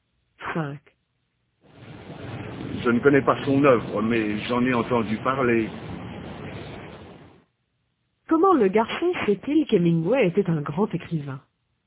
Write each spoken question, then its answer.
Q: Comment le garçon sait-il qu'Hemingway était un grand écrivain?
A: Parce qu'il en a entendu parler.